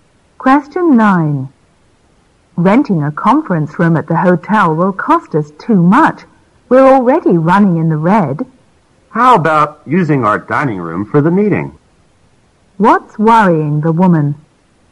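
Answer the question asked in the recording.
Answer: The high cost of renting a hotel conference room when they are already losing money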